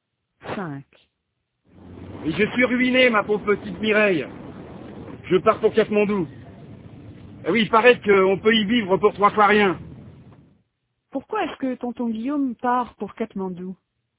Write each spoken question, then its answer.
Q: Pourquoi est-ce que tonton Guillaume part pour Katmandou?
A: Parce qu'il est ruiné et que là-bas, on peut vivre pour 3 fois rien.